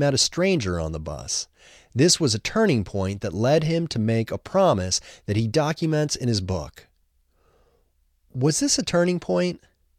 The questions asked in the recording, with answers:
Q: Was this a turning point?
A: Yes, this was a turning point.